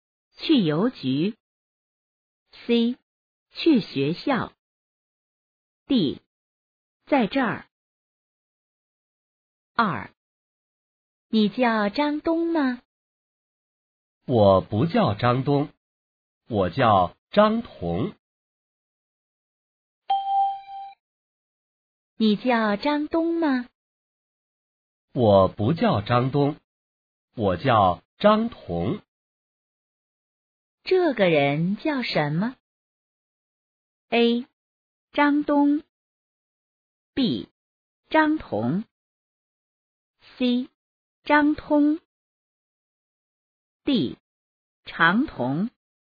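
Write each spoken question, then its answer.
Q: 这个人叫什么?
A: B: 张彤。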